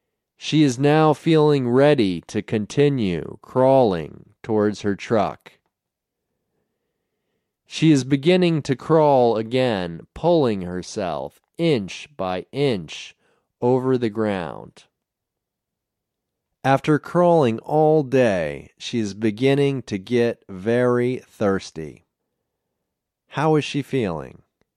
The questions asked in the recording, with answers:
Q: How is she feeling?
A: She is feeling very thirsty.